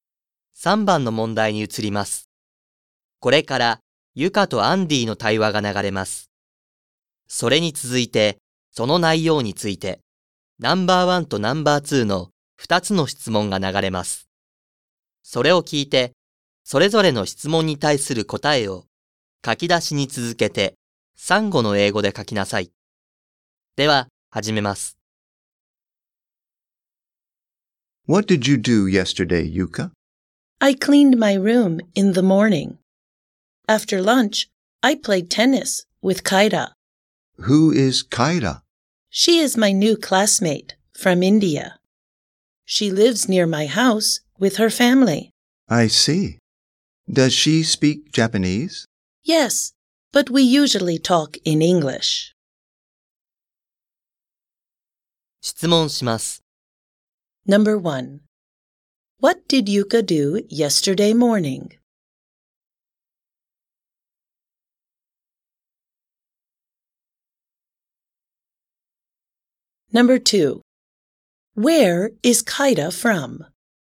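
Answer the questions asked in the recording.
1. She cleaned her room.
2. She is from India.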